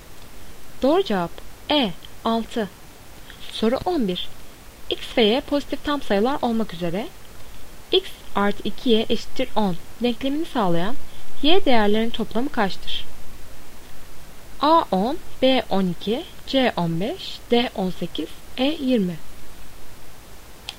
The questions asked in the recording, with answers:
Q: X ve Y pozitif tam sayılar olmak üzere x artı 2y eşittir 10 denklemini sağlayan y değerlerin toplamı kaçtır?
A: Doğru cevap A 10.